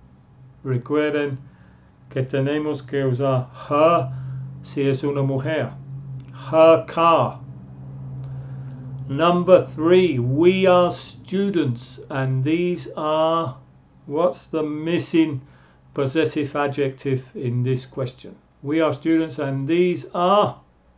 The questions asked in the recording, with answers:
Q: What's the missing possessive adjective in this question?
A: we are students, and these are our books.